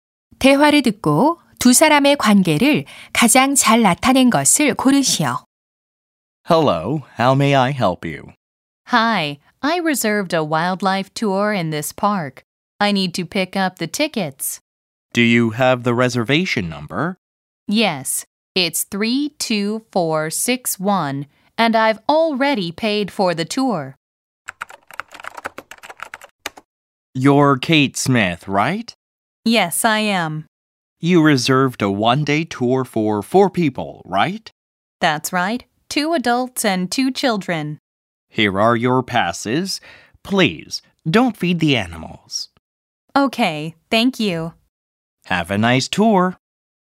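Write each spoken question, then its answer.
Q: 대화를 듣고 두 사람의 관계를 가장 잘 나타낸 것을 고르시오.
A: 공원 매표소 직원 — 관광객(투어 예약자)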